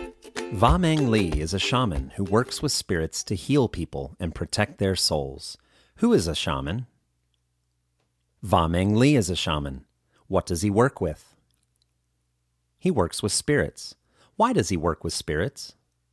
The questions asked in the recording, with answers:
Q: Why does he work with spirits?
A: He works with spirits to heal people and protect their souls.